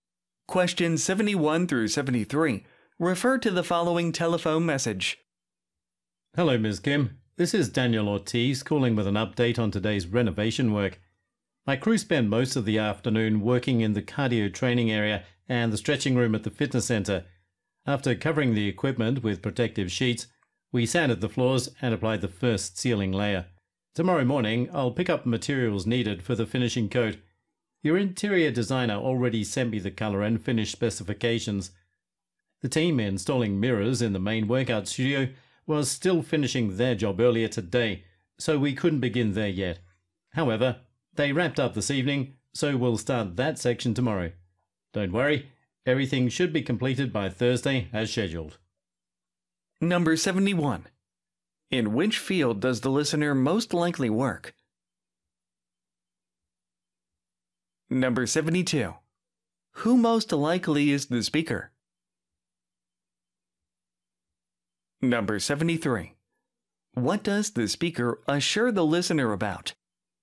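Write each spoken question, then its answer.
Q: In which field does the listener most likely work?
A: Fitness (a fitness center)

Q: Who most likely is the speaker?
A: A renovation contractor (floor refinisher)

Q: What does the speaker assure the listener about?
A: The work will be completed by Thursday as scheduled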